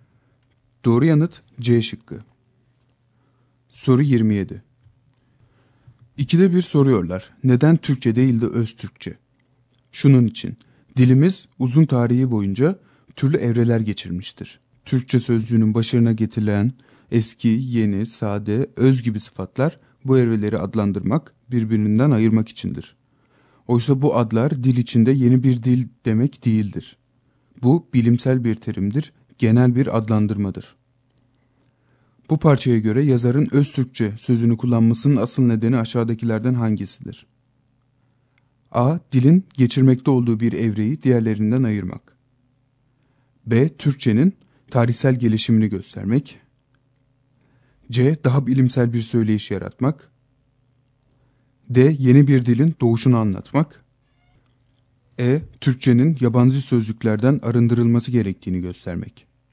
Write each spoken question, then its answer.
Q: Bu parçaya göre yazarın öz Türkçe sözünü kullanmasının asıl nedeni aşağıdakilerden hangisidir?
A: Doğru yanıt A şıkkı.